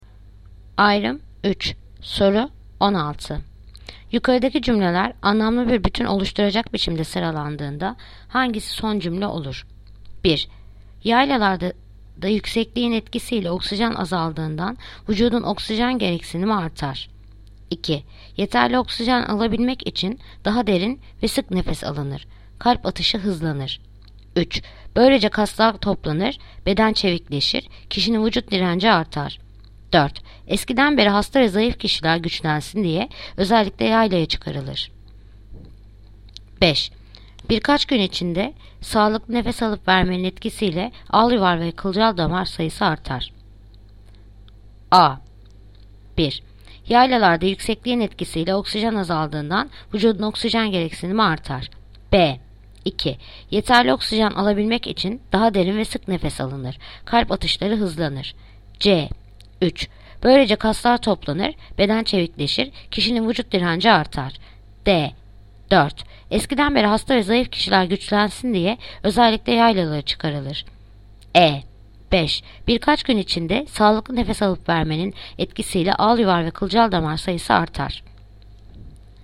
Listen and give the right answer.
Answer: Ceyhan. 3. Böylece kaslar toplanır, beden çevikleşir, kişinin vücut direnci artar.